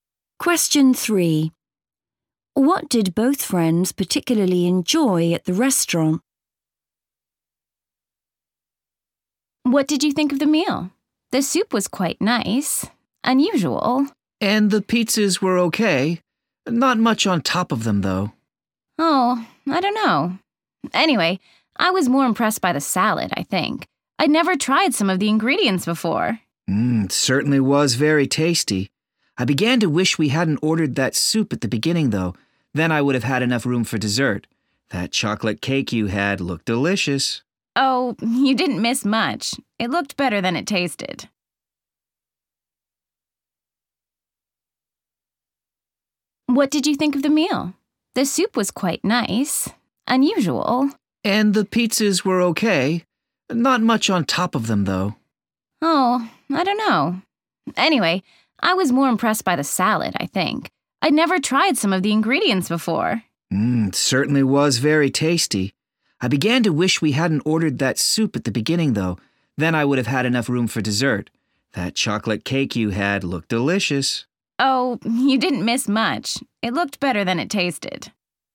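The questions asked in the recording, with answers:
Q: What did both friends particularly enjoy at the restaurant?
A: the salad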